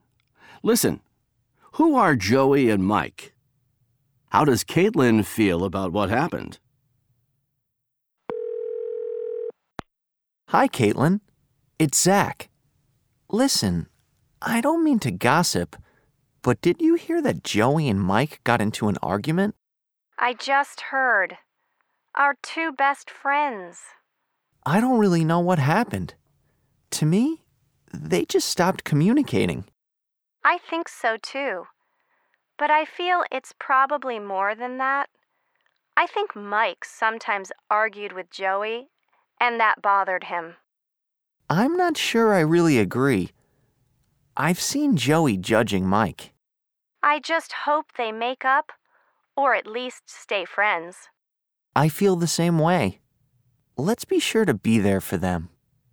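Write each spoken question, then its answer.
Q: Who are Joey and Mike?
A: Zach and Caitlin's two best friends

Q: How does Caitlin feel about what happened?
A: She hopes they make up, or at least stay friends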